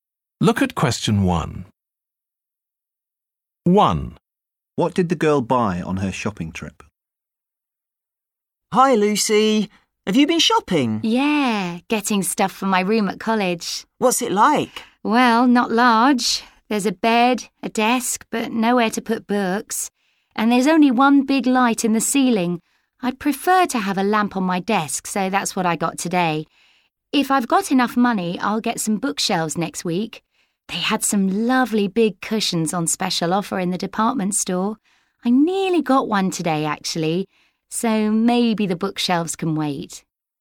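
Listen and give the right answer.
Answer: a lamp for her desk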